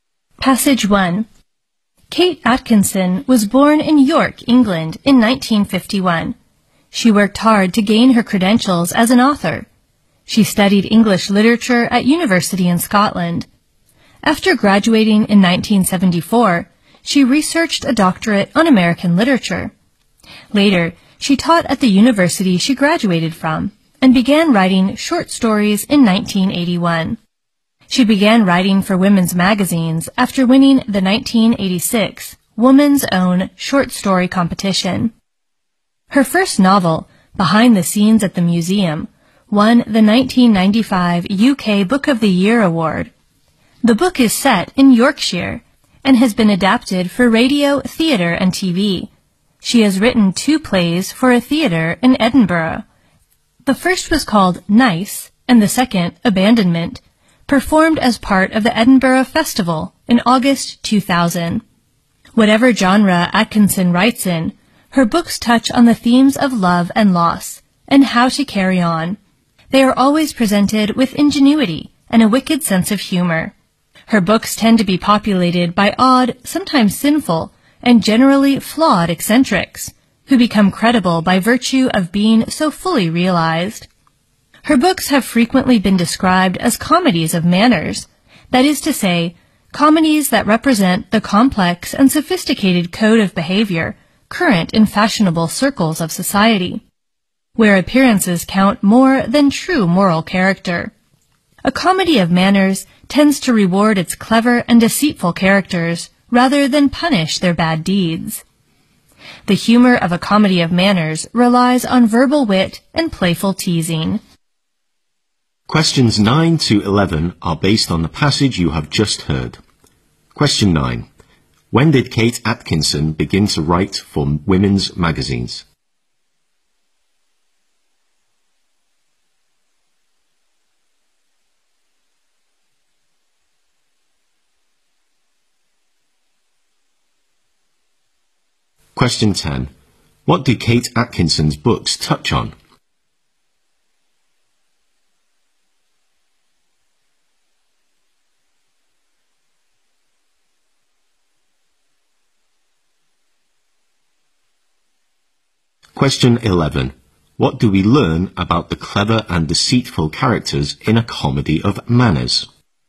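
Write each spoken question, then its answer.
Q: When did Kate Atkinson begin to write for women's magazines?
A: After winning the 1986 Woman's Own Short Story Competition.

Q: What do Kate Atkinson's books touch on?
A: Love and loss and how to carry on.

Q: What do we learn about the clever and deceitful characters in A Comedy of Manners?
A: They tend to be rewarded rather than punished for their bad deeds.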